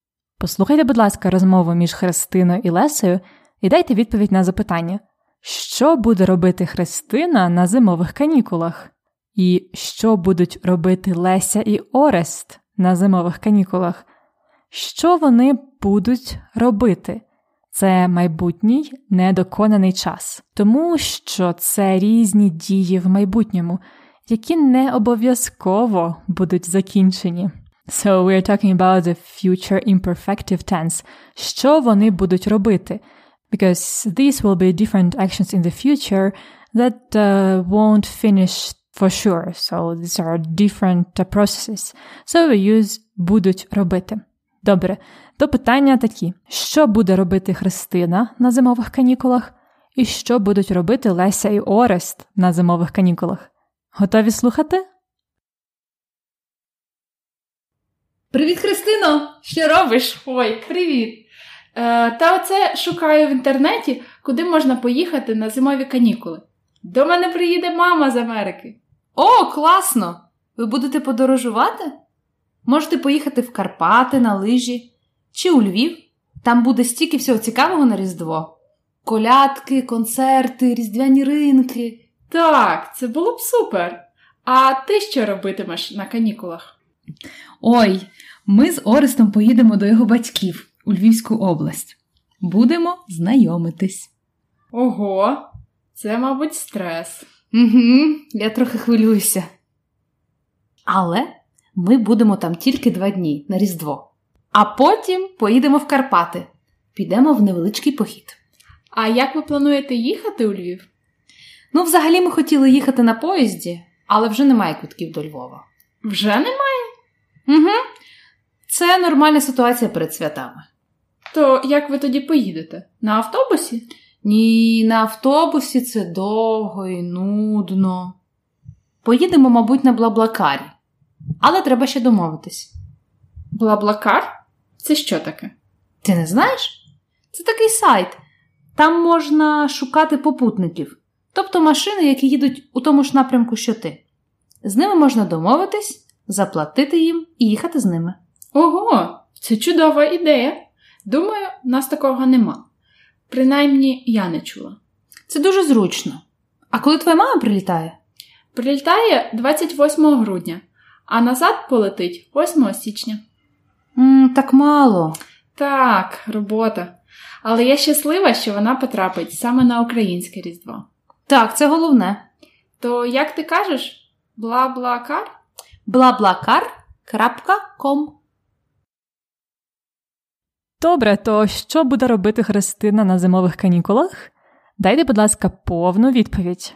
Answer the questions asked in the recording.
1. На зимових канікулах Христина буде подорожувати з мамою.
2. Леся і Орест поїдуть до його батьків у Львівську область.